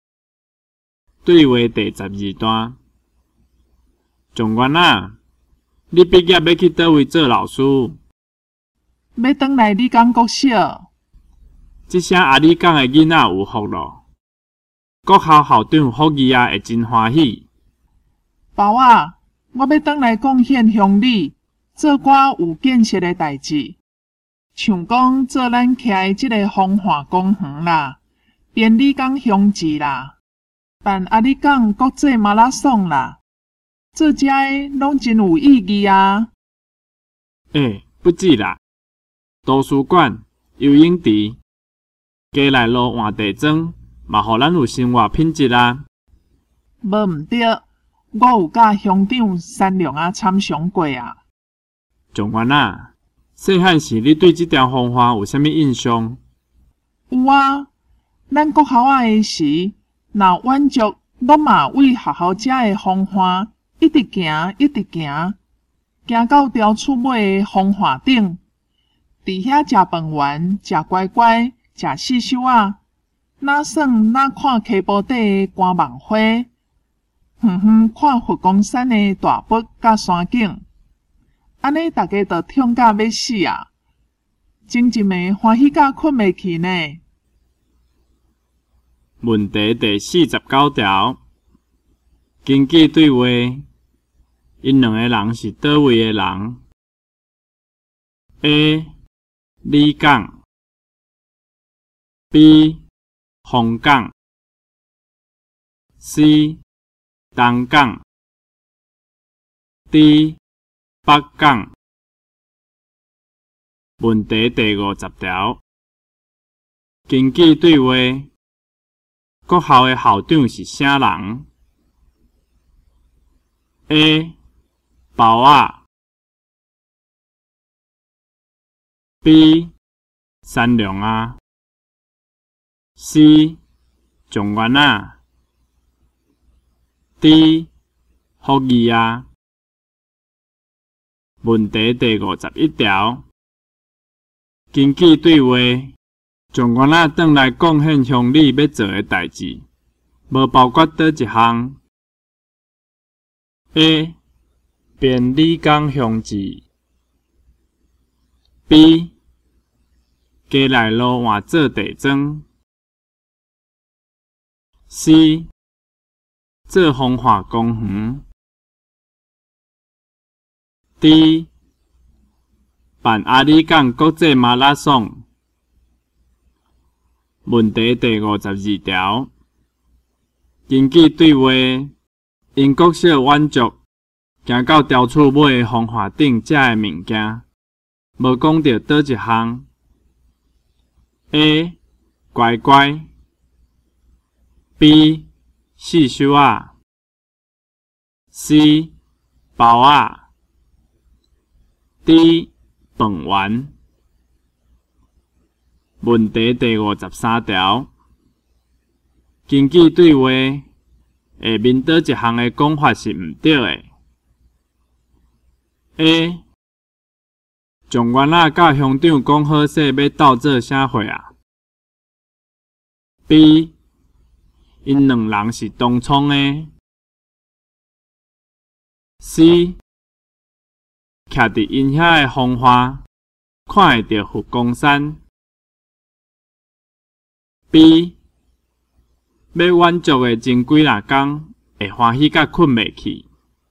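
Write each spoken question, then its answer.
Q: 根据对话,因两个人是倒位的人 ?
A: A: 李港

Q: 国校的校长是啥人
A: D: 福义啊

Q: 英国小晚足,行到雕厝买的风华顶遮的物件,无讲到倒一项。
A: C: 包啊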